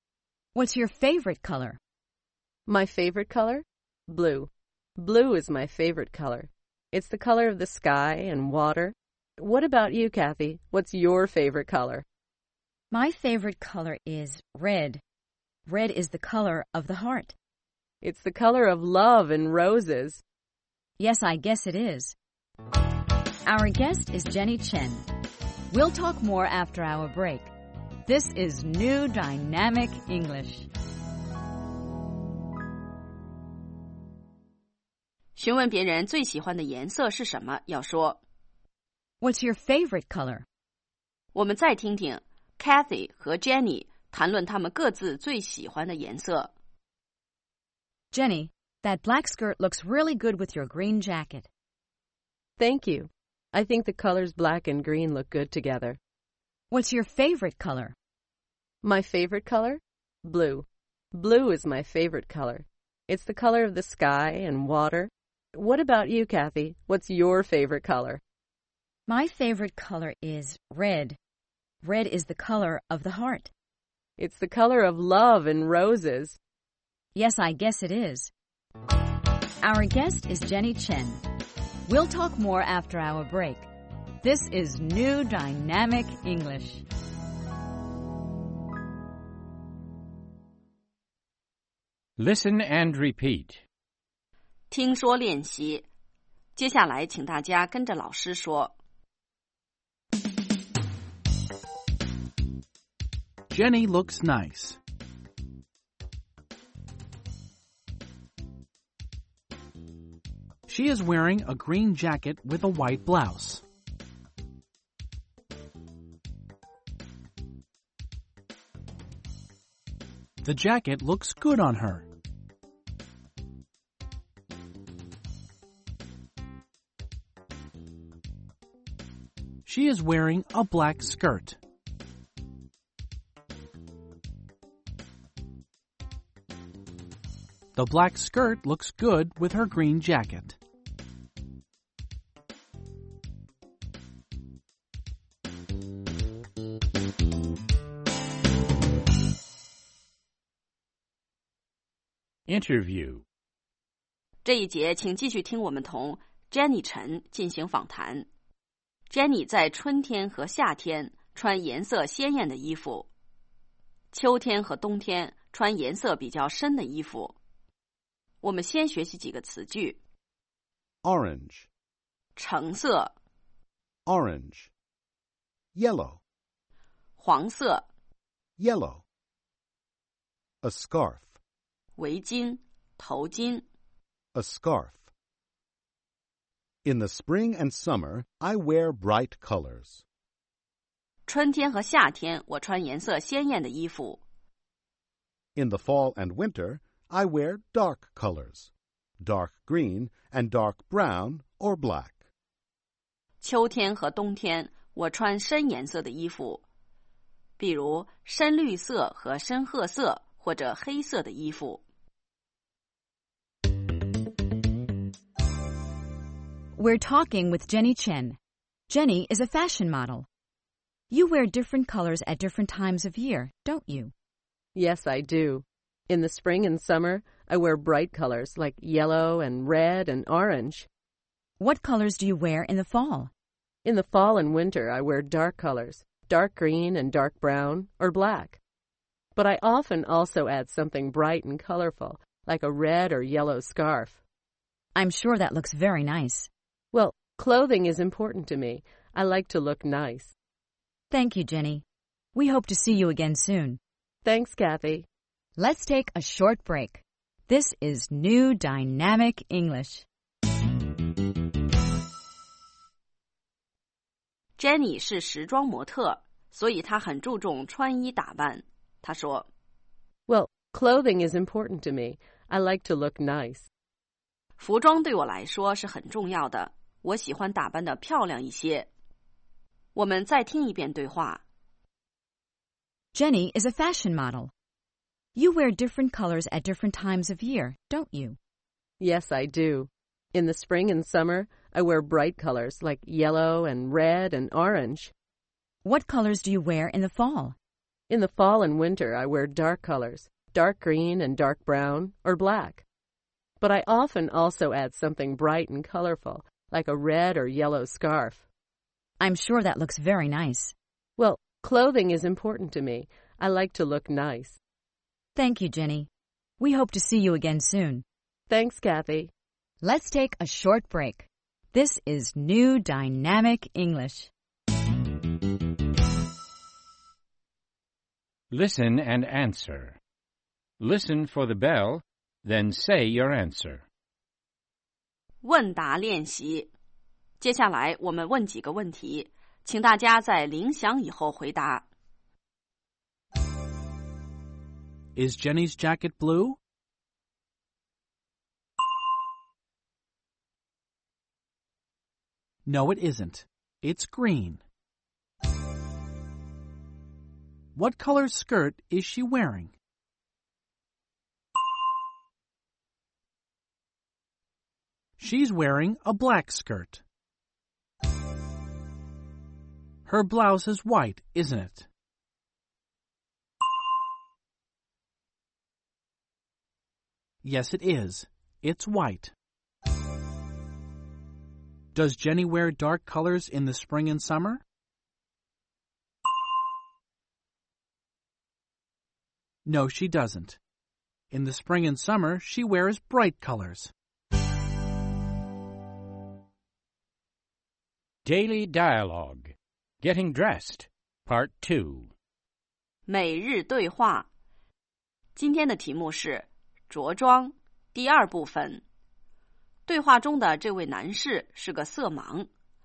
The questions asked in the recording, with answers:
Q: Is Jenny's jacket blue?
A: No, it isn't. It's green.

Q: What color skirt is she wearing?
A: She's wearing a black skirt.

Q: Does Jenny wear dark colors in the spring and summer?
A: No, she doesn't. In the spring and summer, she wears bright colors.